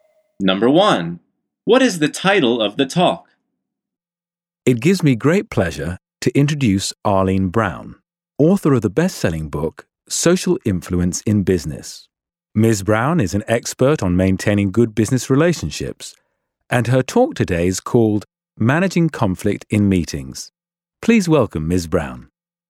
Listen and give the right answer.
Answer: The answer is Managing Conflict in Meetings.